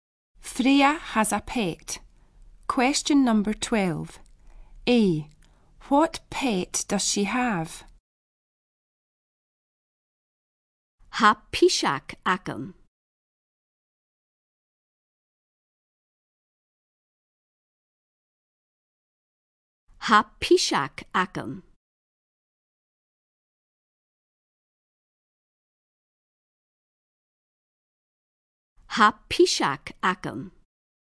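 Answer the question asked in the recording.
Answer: A kitten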